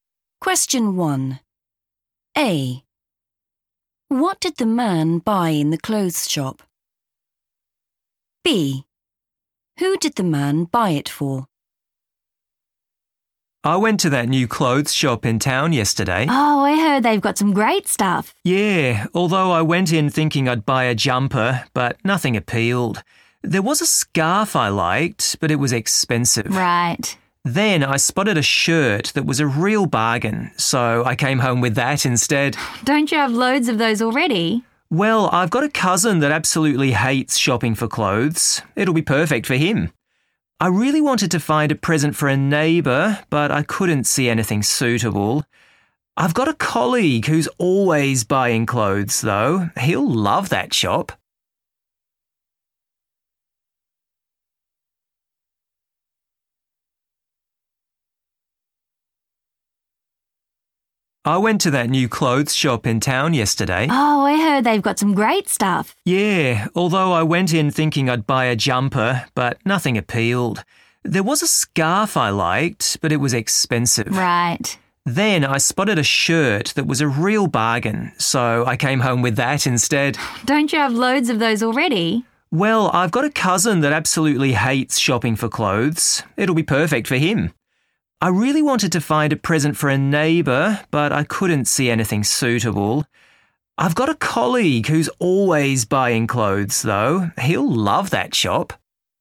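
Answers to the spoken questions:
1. a shirt
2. his cousin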